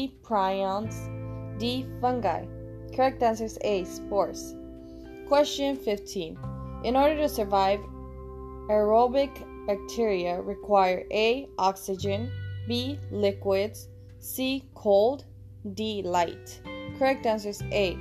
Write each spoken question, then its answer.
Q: In order to survive, aerobic bacteria require A.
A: Correct answer is A. Oxygen.